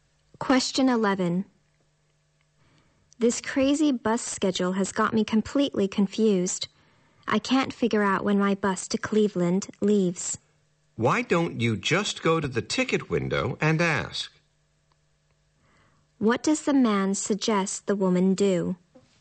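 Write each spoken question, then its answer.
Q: What does the man suggest the woman do?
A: Go to the ticket window and ask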